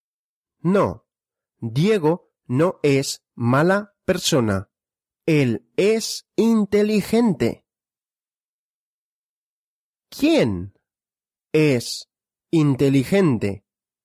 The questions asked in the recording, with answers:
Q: ¿Quién es inteligente?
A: Diego. Diego es inteligente.